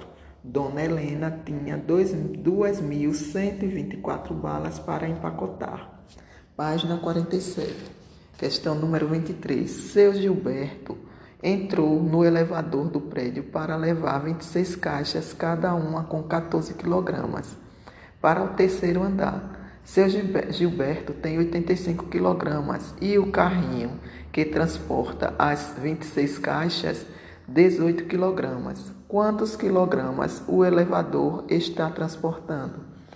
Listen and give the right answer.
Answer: O elevador está transportando 467 kg.